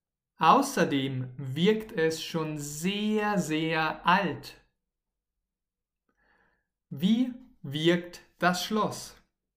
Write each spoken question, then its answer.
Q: Wie wirkt das Schloss?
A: Sehr, sehr alt. Das Schloss wirkt schon sehr, sehr alt.